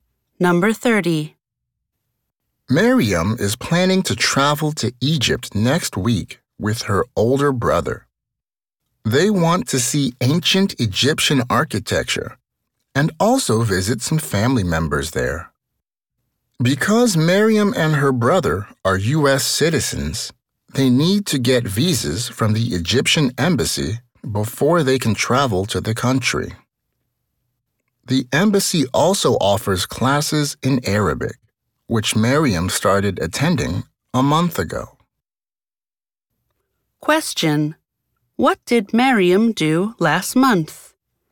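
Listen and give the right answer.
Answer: She started attending Arabic classes at the Egyptian embassy.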